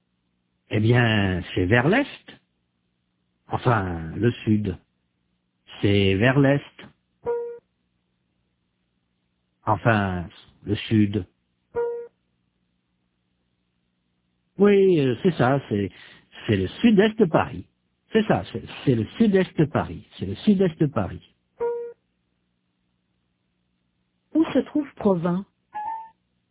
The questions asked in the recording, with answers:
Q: Où se trouve Provins?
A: Au sud-est de Paris.